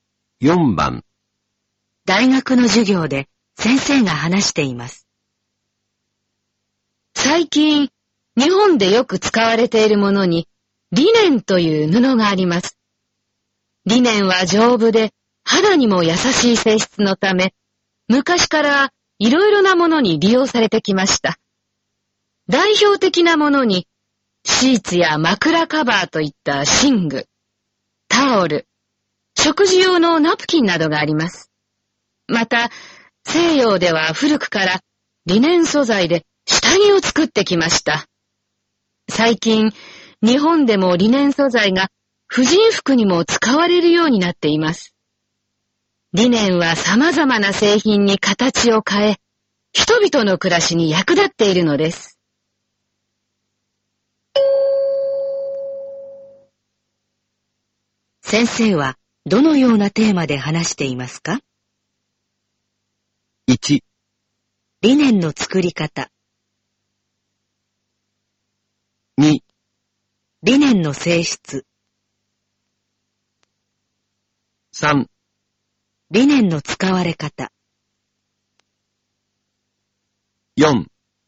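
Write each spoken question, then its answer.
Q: 先生はどのようなテーマで話していますか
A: 3: リネンの使われ方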